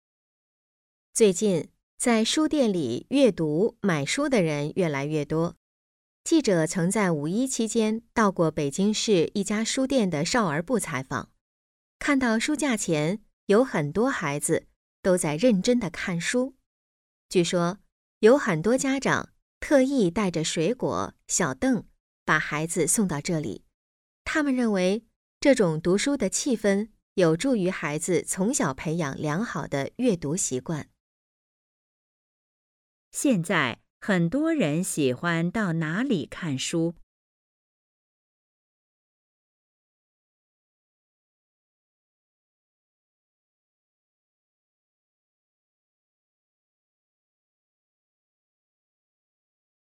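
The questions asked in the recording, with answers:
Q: 现在很多人喜欢到哪里看书?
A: 书店

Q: 家长们为什么把孩子送到这里看书?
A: 他们认为这种读书的气氛有助于孩子从小培养良好的阅读习惯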